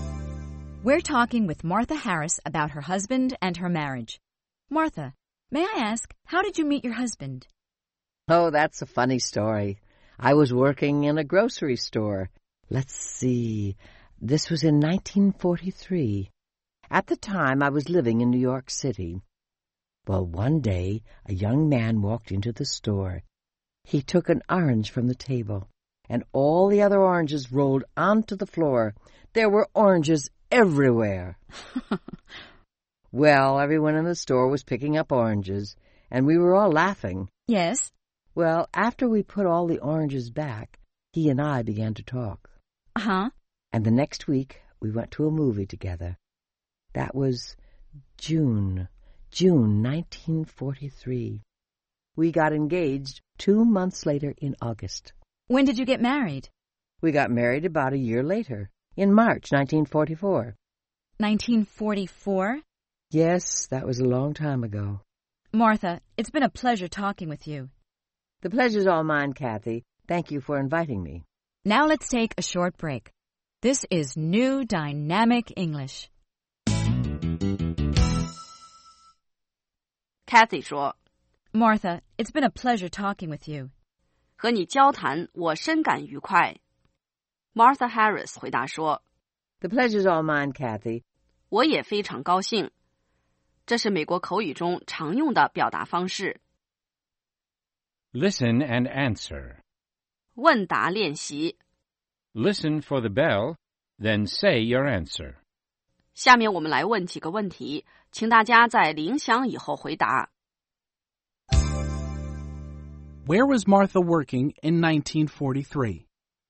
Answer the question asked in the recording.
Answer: In 1943, she was working in a grocery store.